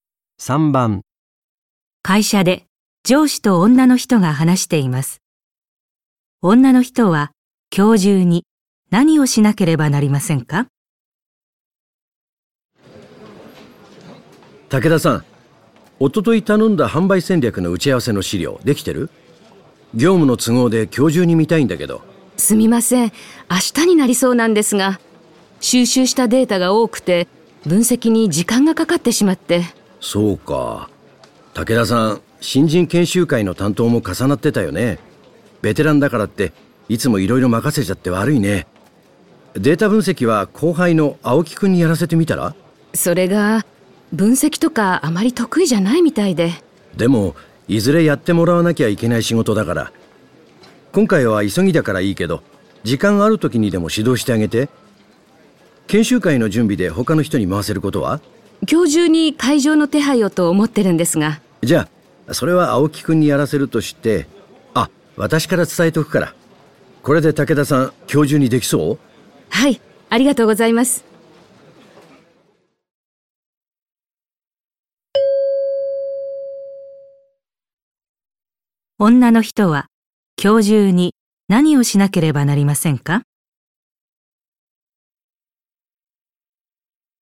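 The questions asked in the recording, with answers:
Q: 女の人は今日中に何をしなければなりませんか?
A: 販売戦略の打ち合わせの資料を完成させる(データ分析を含む)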